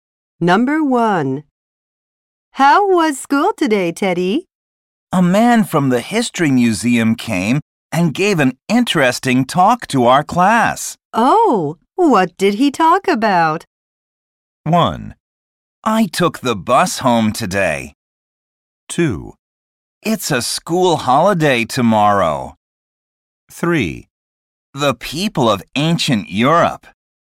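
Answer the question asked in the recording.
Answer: 3: The people of ancient Europe.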